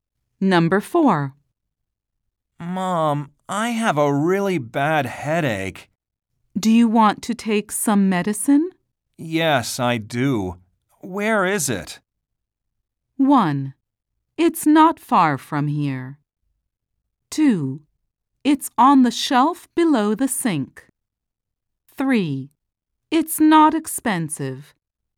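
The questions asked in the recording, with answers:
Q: Yes, I do. Where is it?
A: 2: It's on the shelf below the sink.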